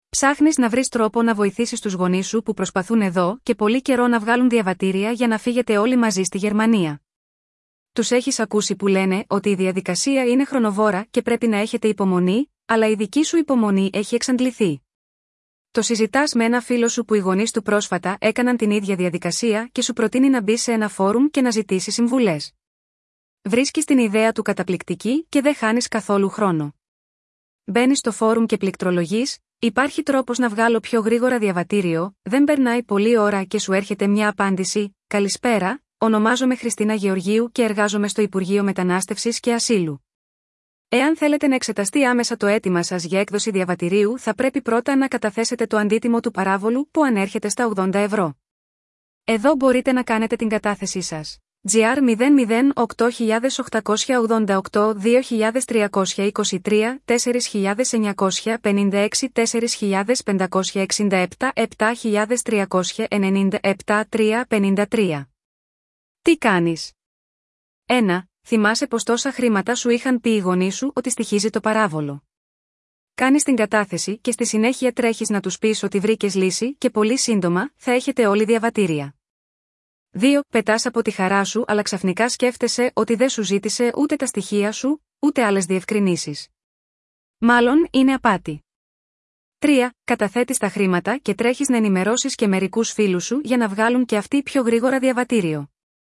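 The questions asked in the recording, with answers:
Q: Τι κάνεις?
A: 2: Πετάς από τη χαρά σου αλλά ξαφνικά σκέφτεσαι ότι δεν σου ζήτησε ούτε τα στοιχεία σου, ούτε άλλες διευκρινήσεις. Μάλλον είναι απάτη.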